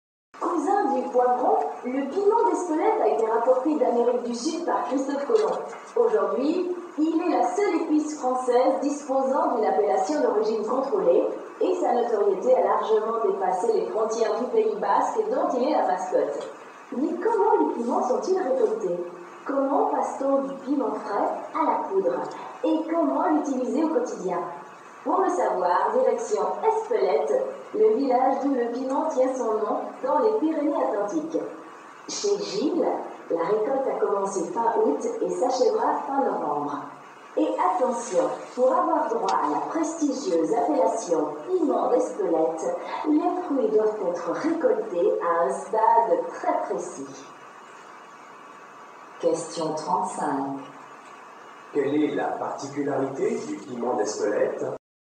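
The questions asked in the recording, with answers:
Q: Quelle est la particularité du piment d'Espelette ?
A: C'est la seule épice française disposant d'une appellation d'origine contrôlée.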